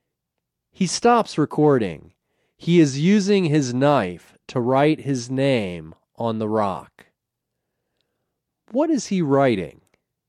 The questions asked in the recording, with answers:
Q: What is he writing?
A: He is writing his name.